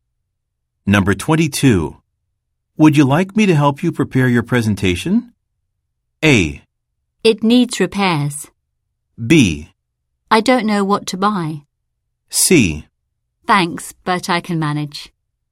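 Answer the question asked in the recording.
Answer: C: Thanks, but I can manage.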